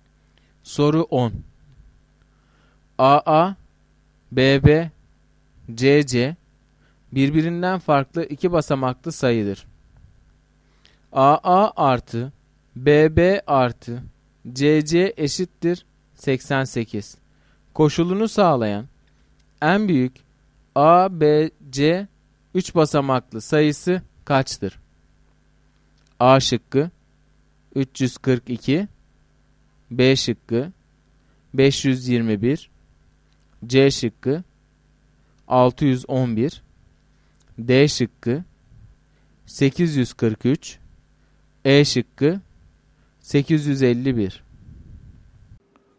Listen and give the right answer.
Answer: Doğru cevap B şıkkı.